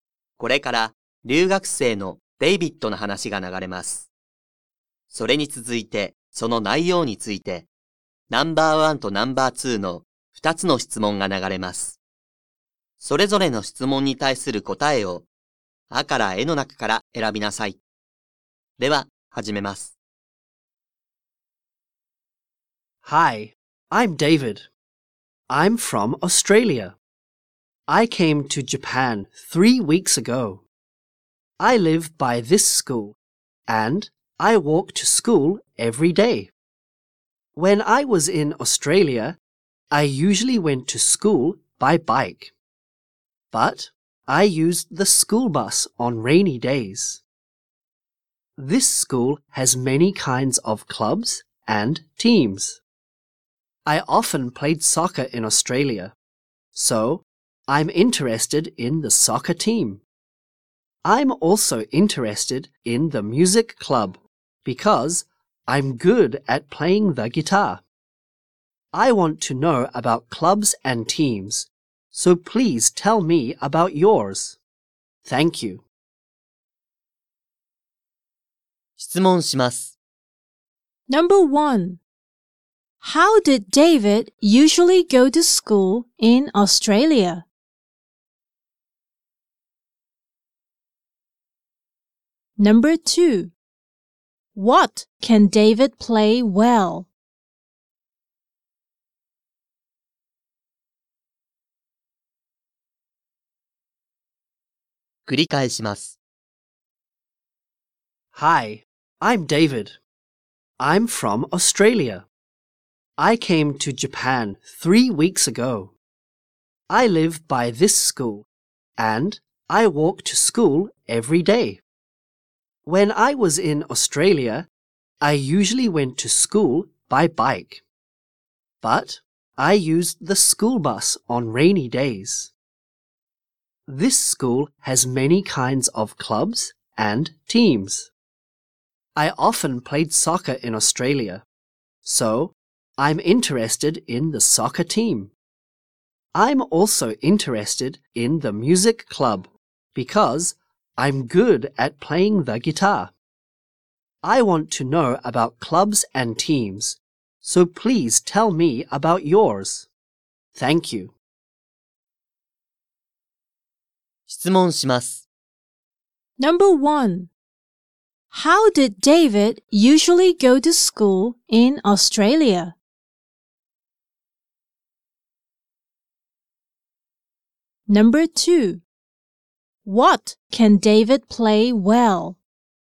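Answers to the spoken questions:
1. By bike.
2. The guitar.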